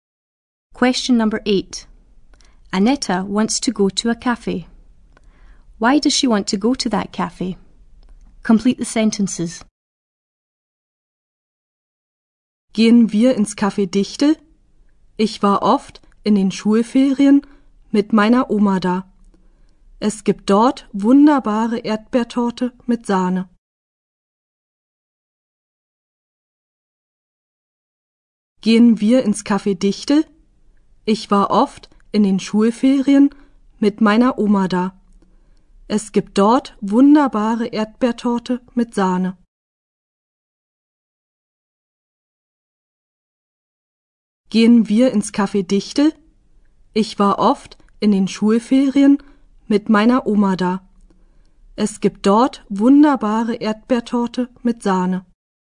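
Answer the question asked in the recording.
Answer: She often went there with her granny in the school holidays; it has wonderful strawberry cake with cream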